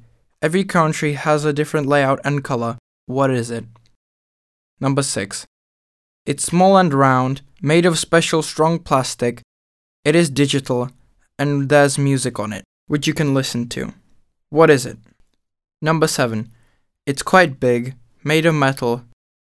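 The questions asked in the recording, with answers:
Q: What is it?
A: a CD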